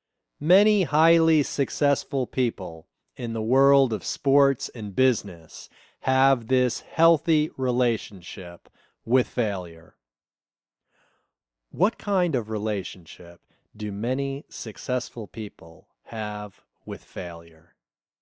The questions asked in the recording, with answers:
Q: What kind of relationship do many successful people have with failure?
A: Many successful people have a healthy relationship with failure.